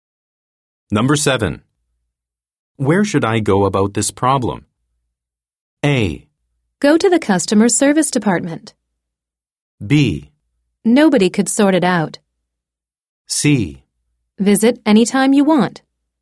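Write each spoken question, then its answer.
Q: Where should I go about this problem?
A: A: Go to the customer service department.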